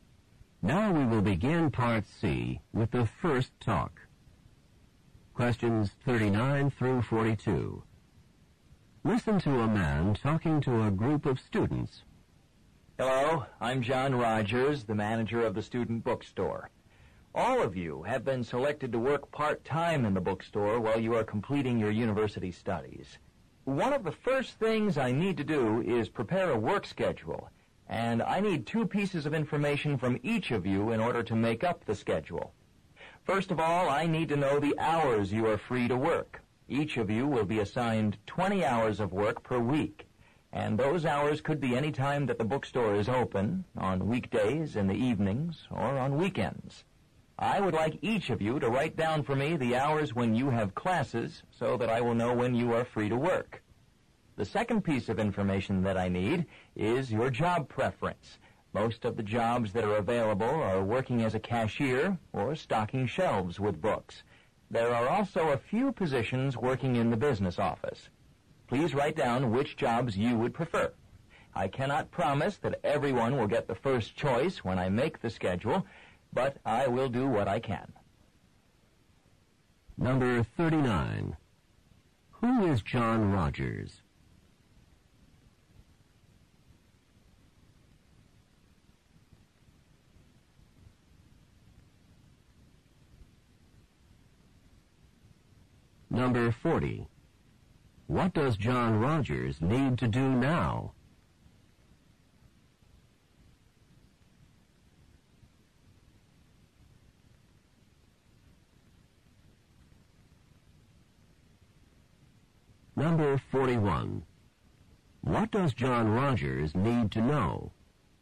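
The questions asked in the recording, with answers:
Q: Who is John Rogers?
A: The manager of the student bookstore

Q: What does John Rogers need to do now?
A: Prepare a work schedule

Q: What does John Rogers need to know?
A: The hours students are free to work and their job preferences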